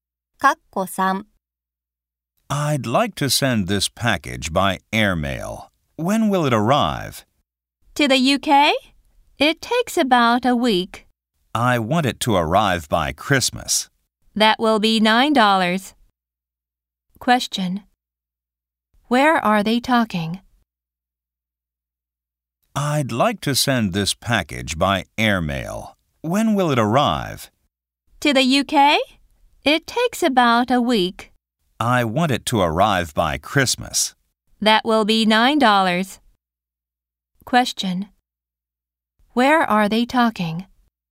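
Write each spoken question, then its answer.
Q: Where are they talking?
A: At a post office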